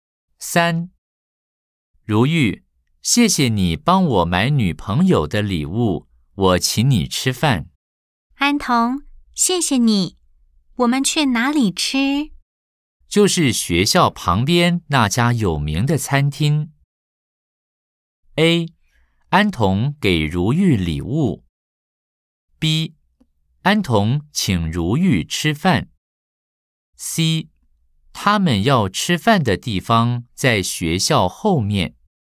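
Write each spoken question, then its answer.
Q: A, 安童给如玉礼物。 B, 安童请如玉吃饭。C。他们要吃饭的地方在学校后面。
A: B: 安童请如玉吃饭。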